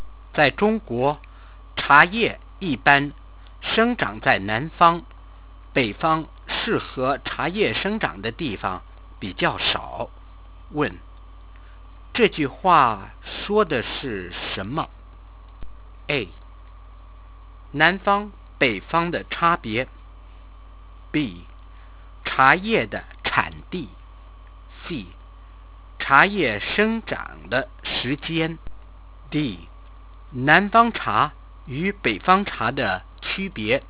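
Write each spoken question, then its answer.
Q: 这句话说的是什么?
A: B: 茶叶的产地。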